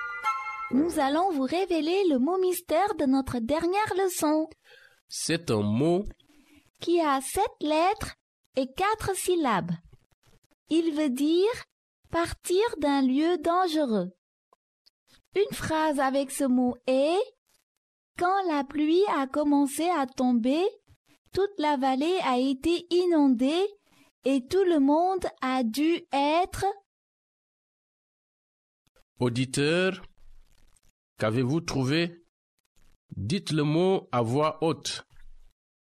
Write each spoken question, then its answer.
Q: Auditeur, qu'avez-vous trouvé?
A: Le mot mystère d'aujourd'hui est évacuer.